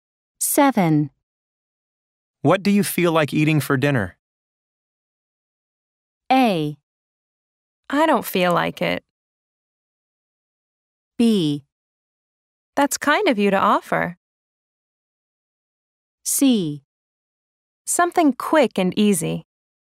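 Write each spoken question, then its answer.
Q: What do you feel like eating for dinner?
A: C: Something quick and easy.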